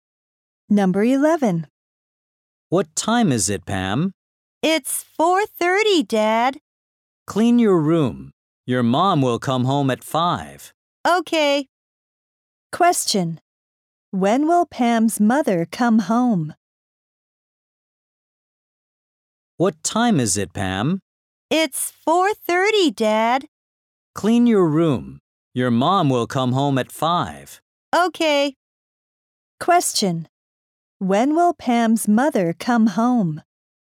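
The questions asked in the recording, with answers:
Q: When will Pam's mother come home?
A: At 5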